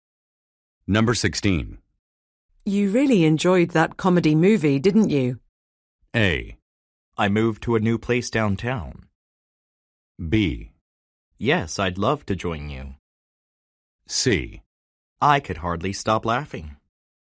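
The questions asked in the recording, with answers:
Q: You really enjoyed that comedy movie, didn't you?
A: C: I could hardly stop laughing.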